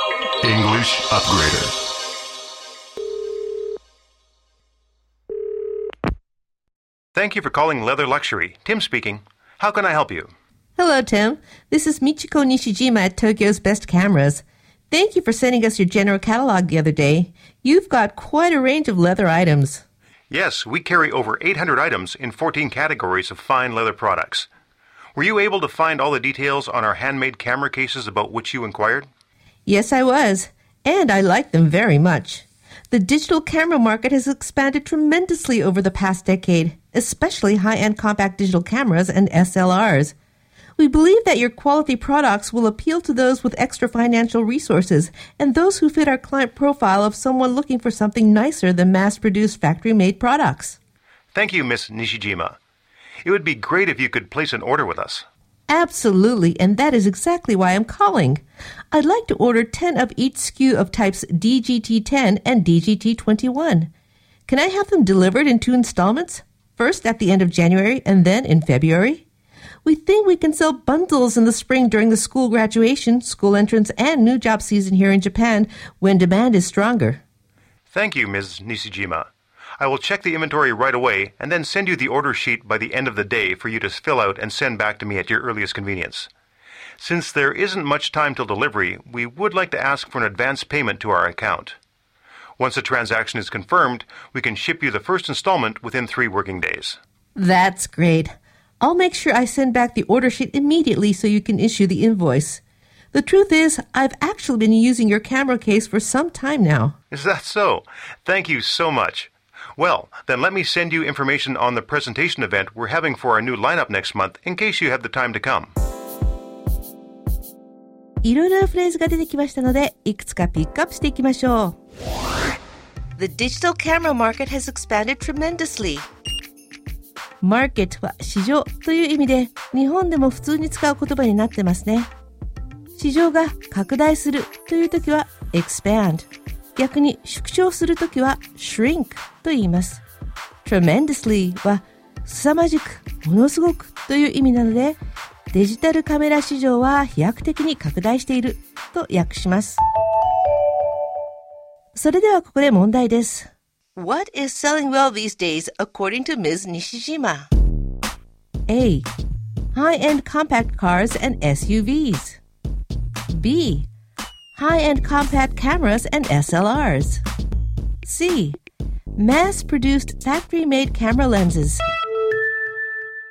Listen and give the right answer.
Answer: B は高級コンパクトカメラと SLR。